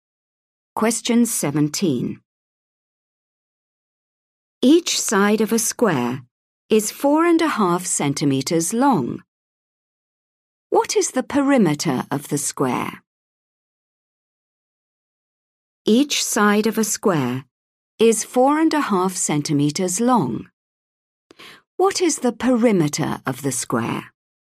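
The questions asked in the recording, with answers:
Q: What is the perimeter of the square?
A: 18 centimeters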